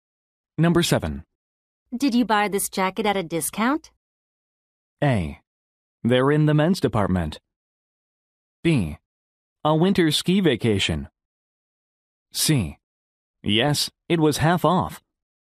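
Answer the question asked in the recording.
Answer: C: Yes, it was half off.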